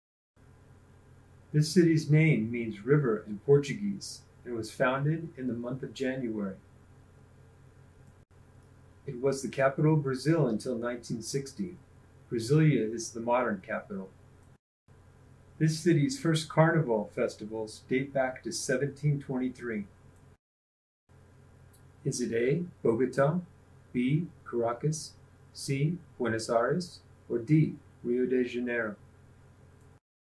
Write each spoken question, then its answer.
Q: Is it A, Bogota, B, Caracas, C, Buenos Aires, or D, Rio de Janeiro?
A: If you chose Rio, you're correct.